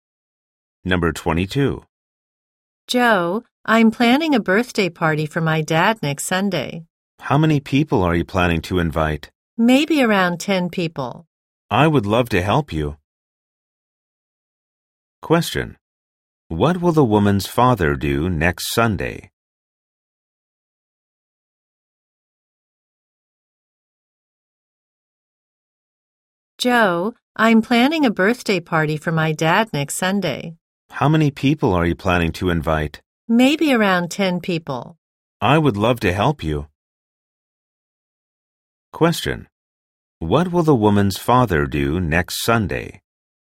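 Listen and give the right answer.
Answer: Have a birthday party.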